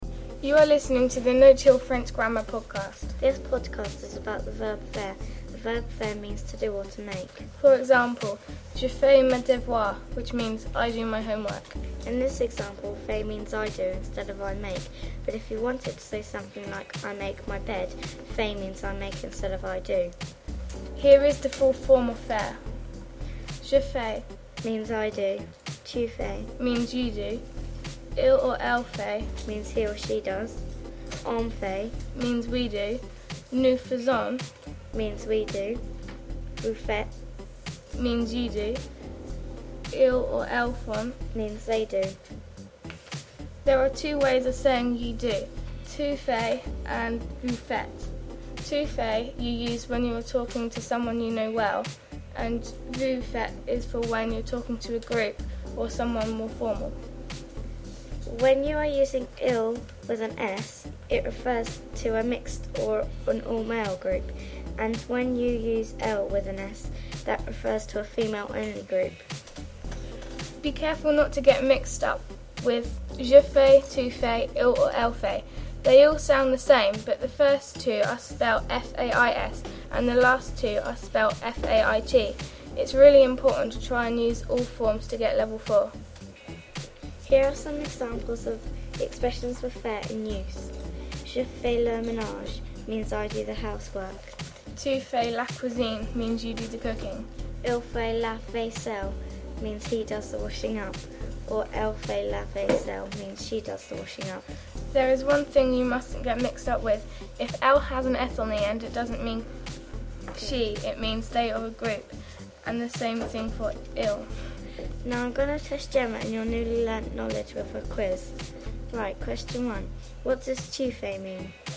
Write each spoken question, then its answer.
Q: What does tu fais mean?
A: You do?